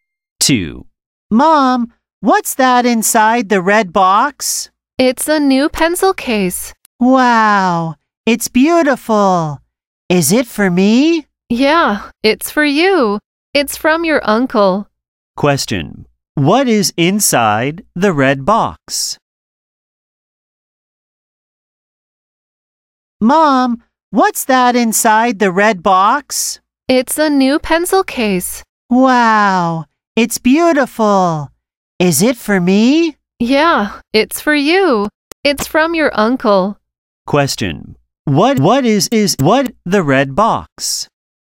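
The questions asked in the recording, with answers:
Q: What is inside the red box?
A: A new pencil case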